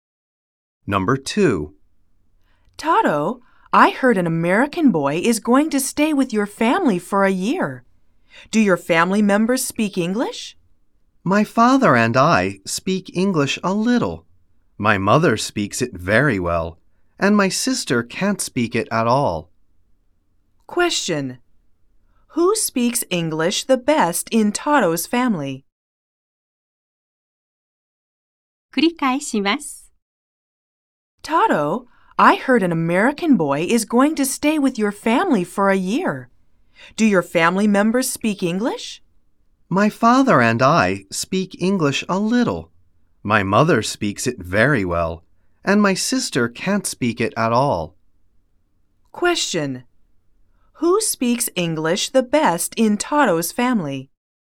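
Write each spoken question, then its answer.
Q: Who speaks English the best in Tato's family?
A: Her/his mother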